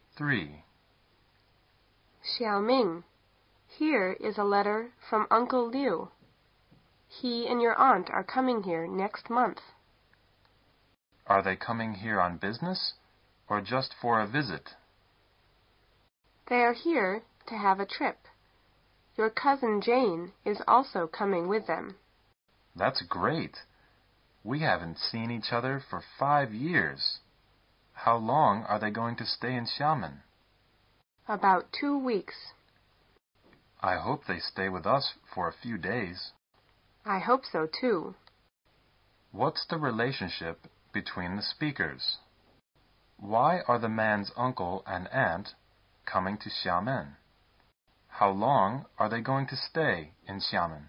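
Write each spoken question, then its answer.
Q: Why are the man's uncle and aunt coming to Xiamen?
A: To have a trip

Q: How long are they going to stay in Xiamen?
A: About 2 weeks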